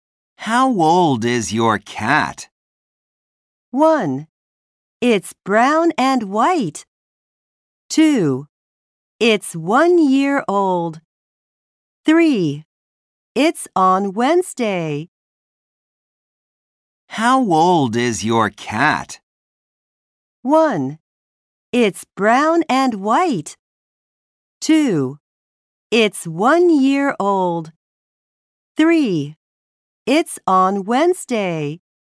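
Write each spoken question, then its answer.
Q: How old is your cat?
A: 2: It's 1 year old.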